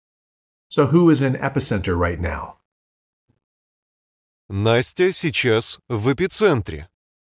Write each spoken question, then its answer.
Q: So who is in Epicenter right now?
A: Настя.